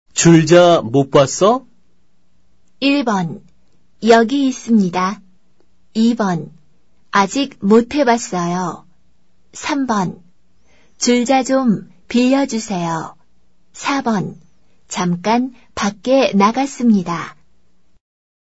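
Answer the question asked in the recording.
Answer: 1: 여기 있습니다.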